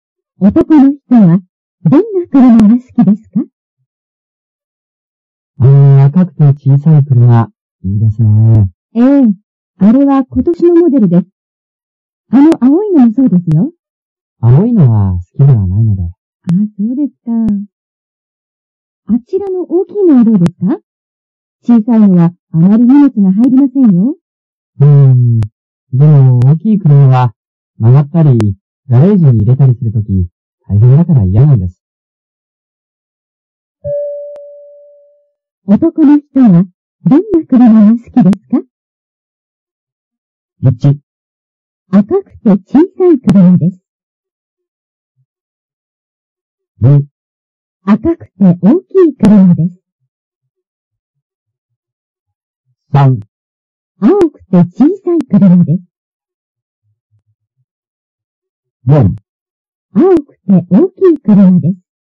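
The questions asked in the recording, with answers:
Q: 男の人はどんな車が好きですか?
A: 1: 赤くて小さい車です。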